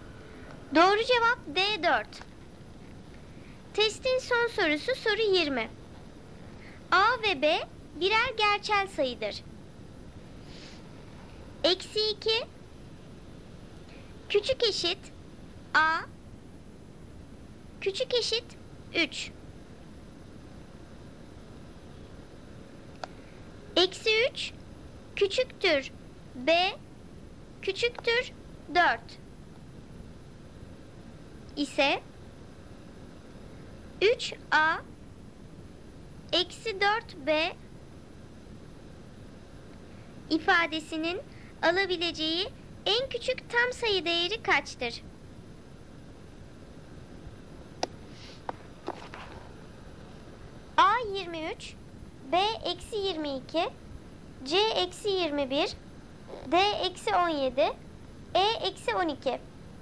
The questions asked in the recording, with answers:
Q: ifadesinin alabileceği en küçük tam sayı değeri kaçtır?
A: Doğru cevap C eksi 21.